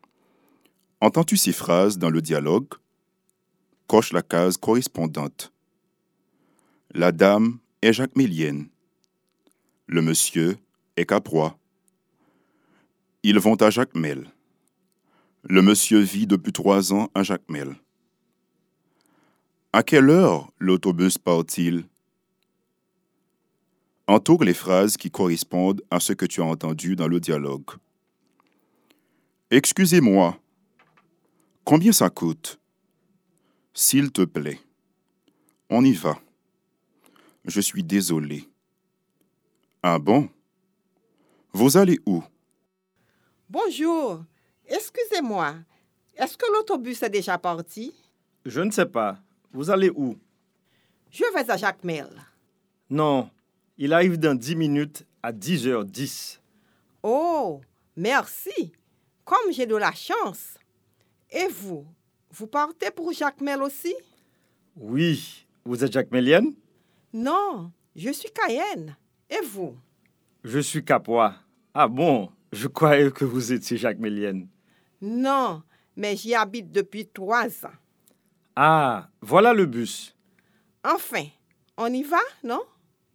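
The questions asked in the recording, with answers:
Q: À quelle heure l'autobus part-il?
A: À 10h10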